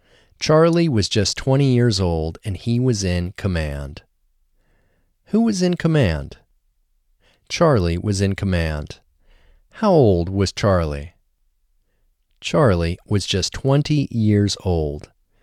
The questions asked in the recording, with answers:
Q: How old was Charlie?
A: Charlie was just 20 years old.